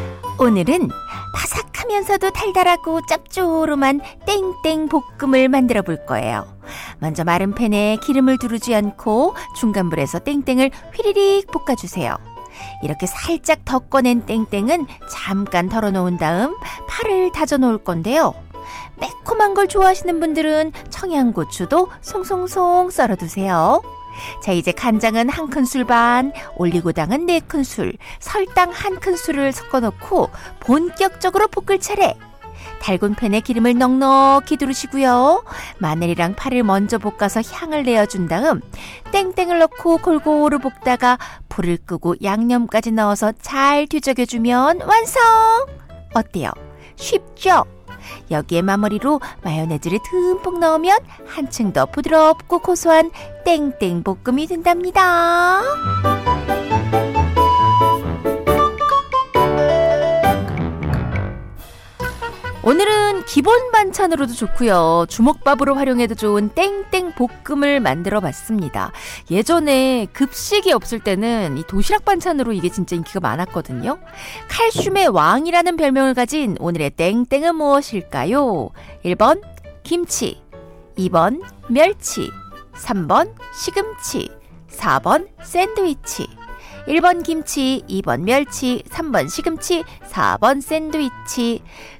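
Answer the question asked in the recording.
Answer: 2: 멸치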